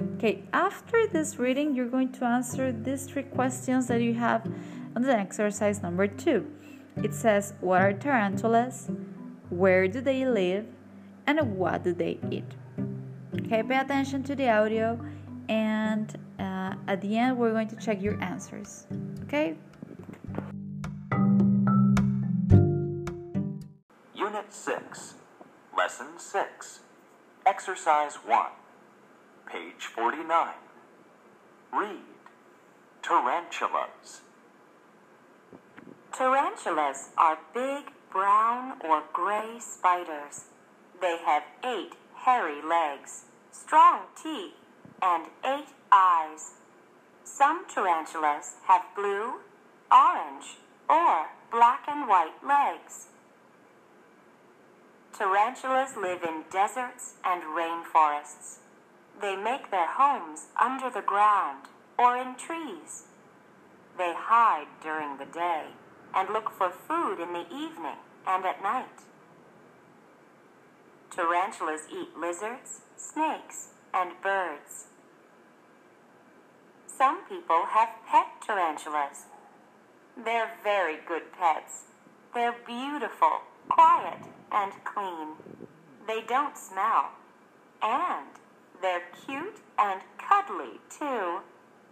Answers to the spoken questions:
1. The answer is, they are spiders.
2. the answer is, they live in deserts and rainforests.
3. They eat, very good, lizards, snakes, and birds.